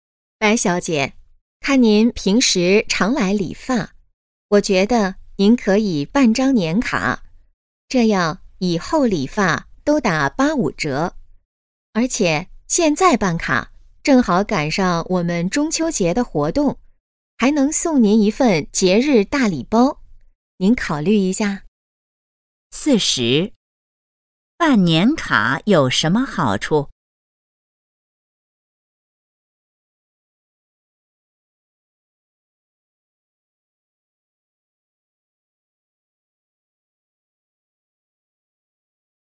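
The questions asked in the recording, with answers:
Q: 办年卡有什么好处?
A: 理发打85折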